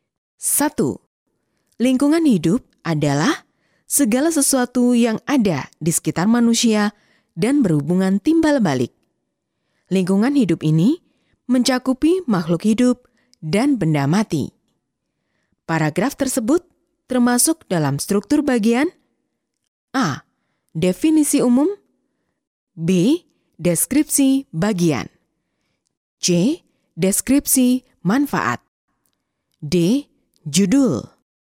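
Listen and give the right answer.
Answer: A: Definisi umum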